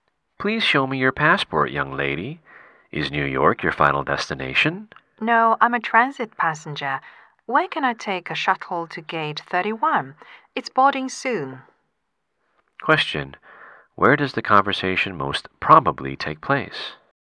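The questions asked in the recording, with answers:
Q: Where does the conversation most probably take place?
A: At an airport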